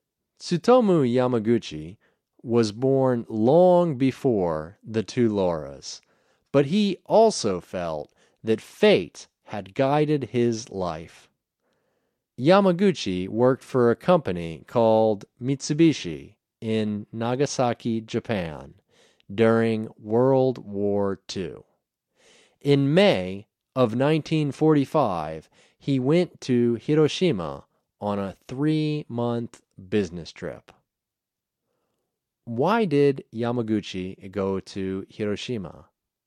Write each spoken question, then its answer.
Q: Why did Yamaguchi go to Hiroshima?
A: He went to Hiroshima on a business trip.